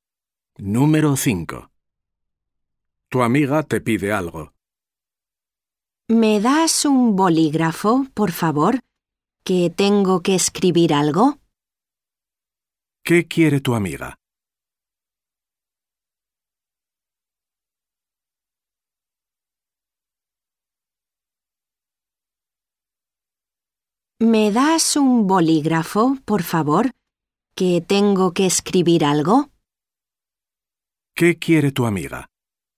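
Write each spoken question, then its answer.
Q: ¿Qué quiere tu amiga?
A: Un bolígrafo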